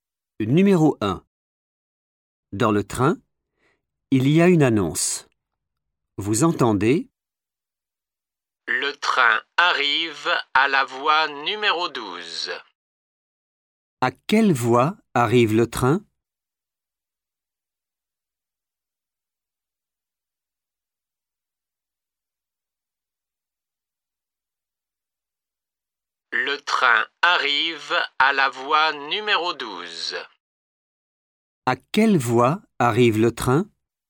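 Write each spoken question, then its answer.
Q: À quelle voie arrive le train?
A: voie numéro 12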